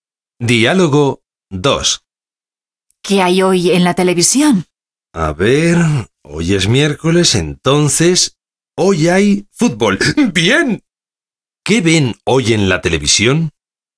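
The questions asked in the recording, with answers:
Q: ¿Qué ven hoy en la televisión?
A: Fútbol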